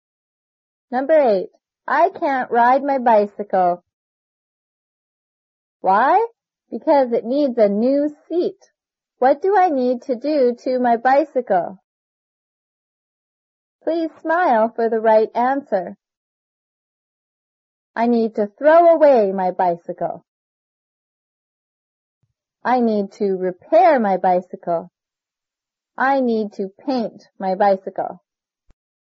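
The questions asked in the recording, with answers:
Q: What do I need to do to my bicycle?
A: I need to repair my bicycle.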